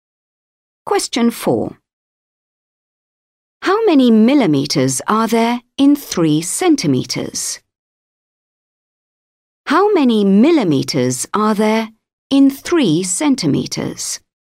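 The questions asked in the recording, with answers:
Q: How many millimeters are there in 3 centimeters?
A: 30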